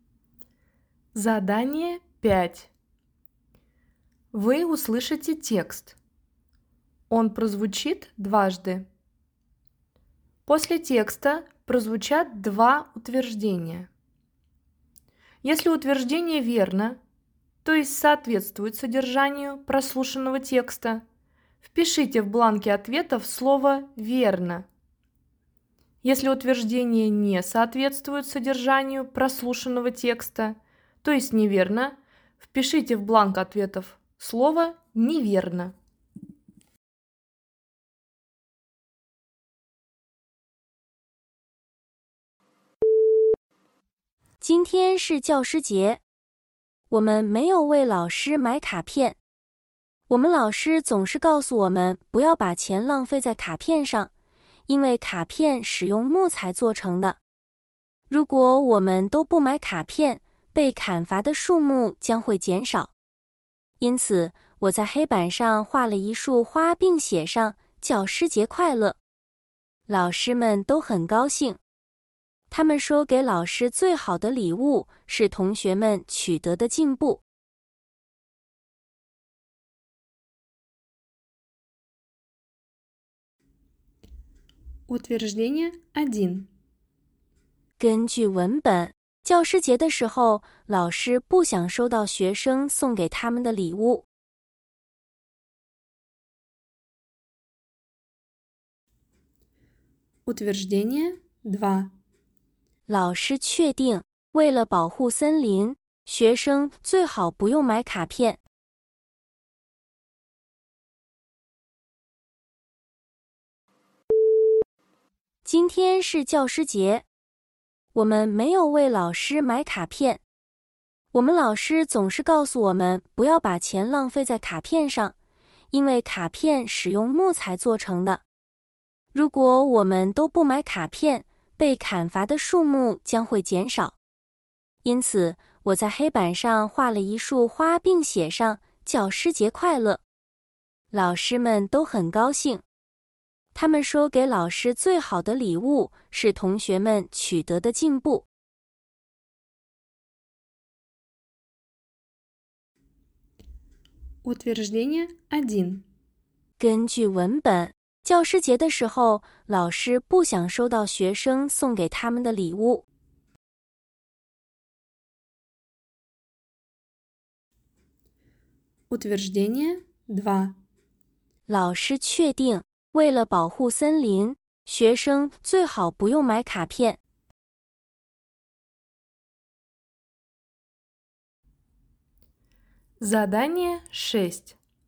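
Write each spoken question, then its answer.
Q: 老师确定,为了保护森林,学生最好不用买卡片。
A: 正确(对)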